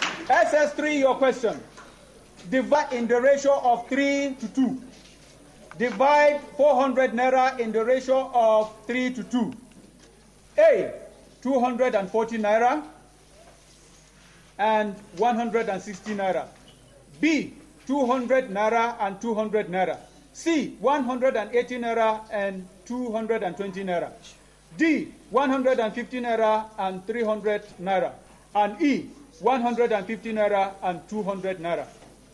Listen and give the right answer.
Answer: Yes, 240 to 160 naira.